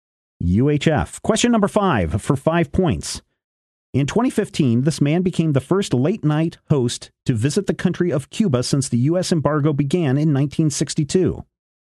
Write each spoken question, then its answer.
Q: In 2015, this man became the first late-night host to visit the country of Cuba since the U.S.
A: That is correct.